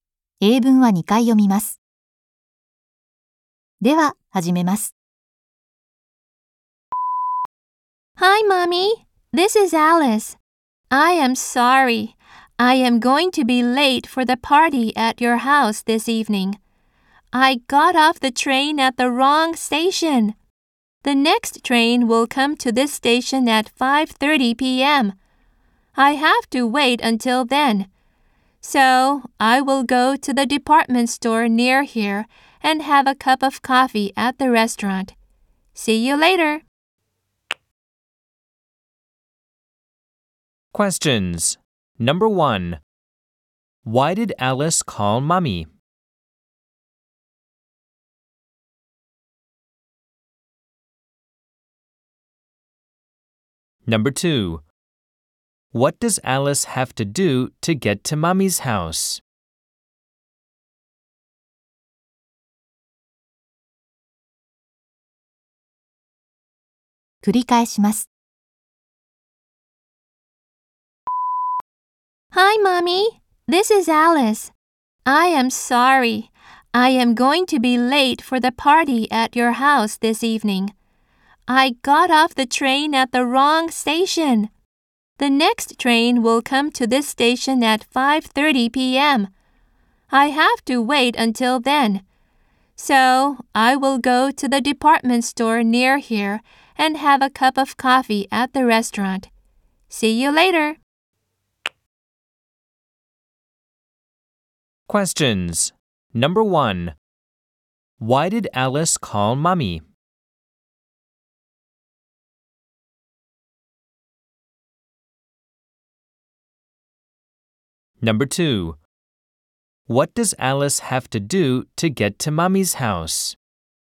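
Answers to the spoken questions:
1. Because she will be late for the party.
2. Wait for the next train at 5:30 p.m.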